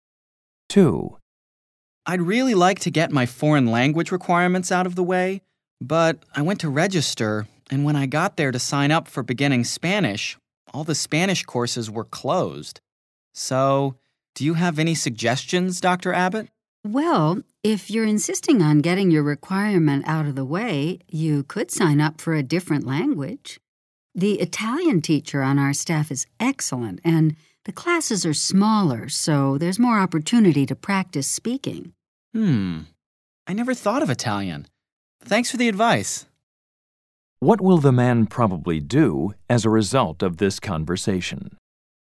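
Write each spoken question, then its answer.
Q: What will the man probably do as a result of this conversation?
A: Sign up for an Italian course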